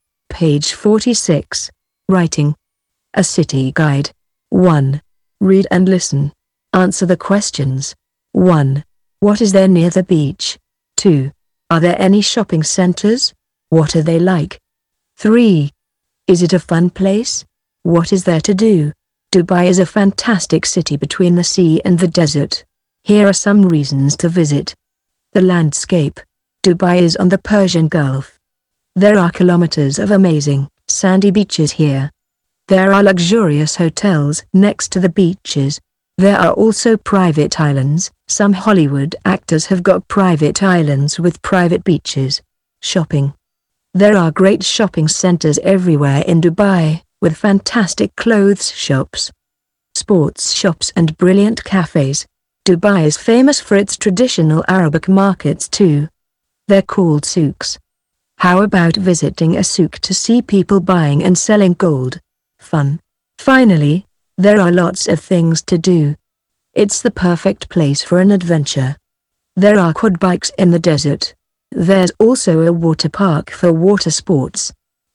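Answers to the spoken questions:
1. Luxurious hotels
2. Yes, there are great shopping centers everywhere in Dubai
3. Great, with fantastic clothes shops, sports shops and brilliant cafes
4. Yes, there are lots of things to do
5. Quad bikes in the desert and a water park for water sports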